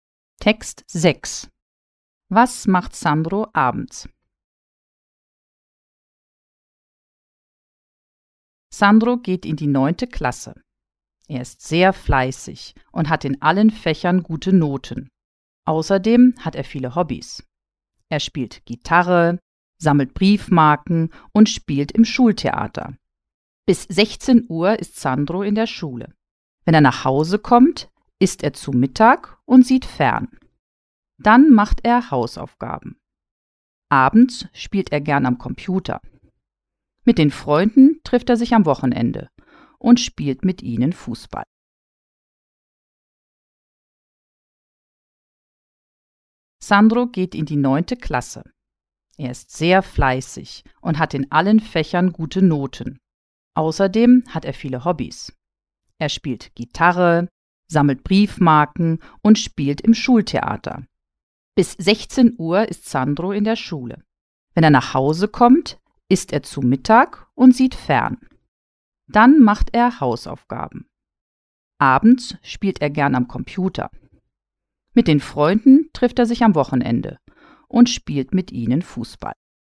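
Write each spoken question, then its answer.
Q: Was macht Sandro abends?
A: Er spielt am Computer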